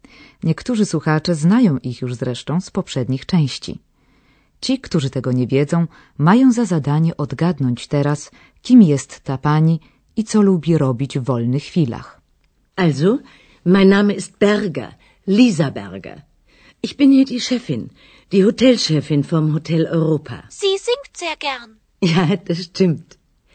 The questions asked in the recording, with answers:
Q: kim jest ta pani i co lubi robić w wolnych chwilach.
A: jest szefową hotelu Europa w Aachen, gdzie rozgrywa się większa część naszego kursu.